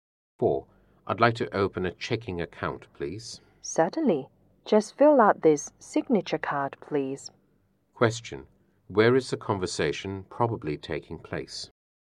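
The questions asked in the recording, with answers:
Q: Where is the conversation probably taking place?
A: In a bank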